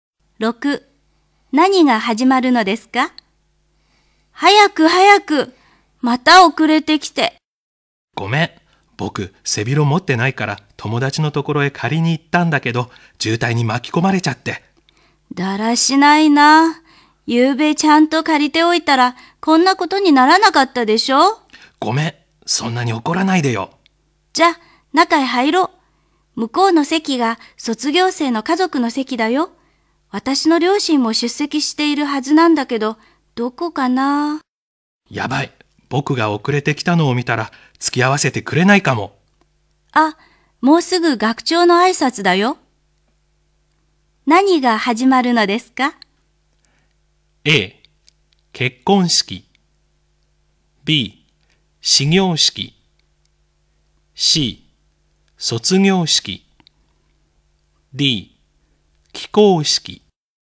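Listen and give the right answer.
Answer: C: 卒業式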